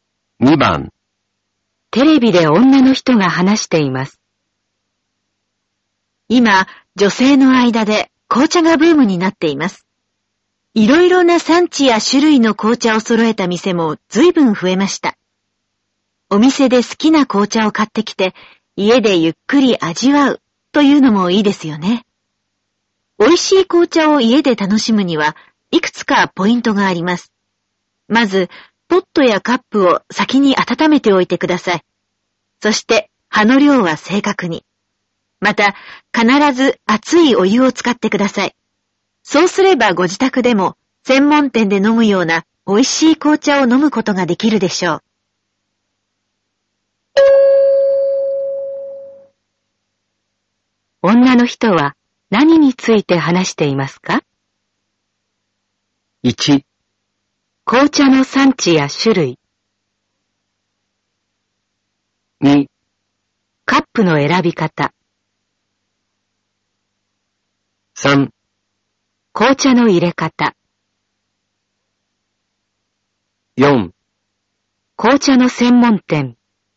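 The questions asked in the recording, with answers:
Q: 女の人は何について話していますか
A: 3: 紅茶の入れ方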